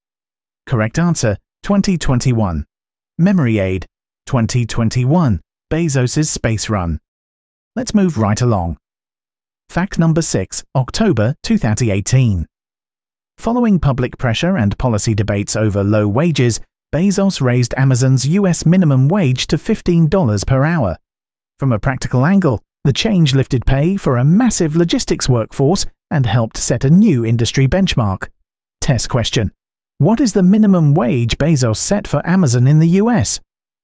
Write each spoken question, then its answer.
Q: What is the minimum wage Bezos set for Amazon in the US?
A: Correct answer, $15 per hour.